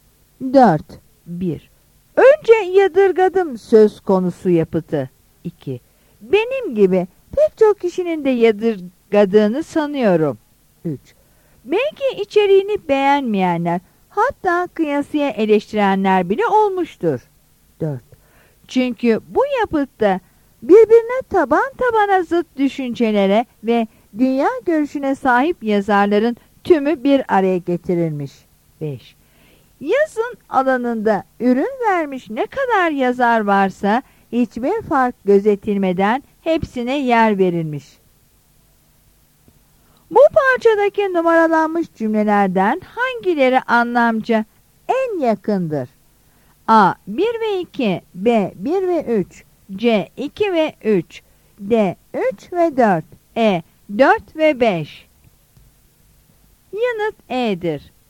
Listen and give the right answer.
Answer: Yanıt E'dir.